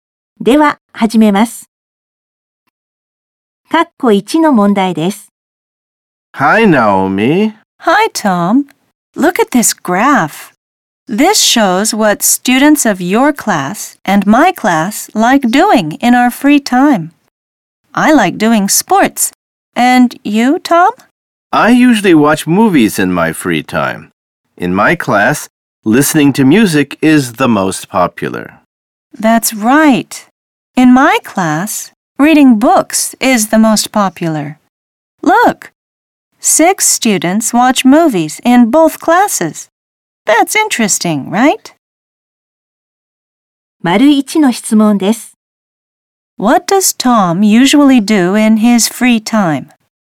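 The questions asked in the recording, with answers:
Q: What does Tom usually do in his free time?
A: He watches movies.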